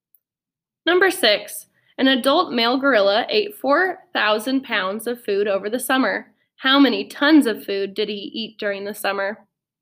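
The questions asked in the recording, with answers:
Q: How many tons of food did he eat during the summer?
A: 2 tons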